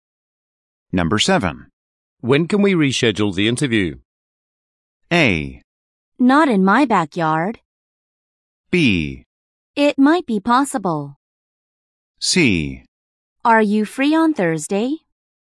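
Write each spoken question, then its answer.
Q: When can we reschedule the interview?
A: C: Are you free on Thursday?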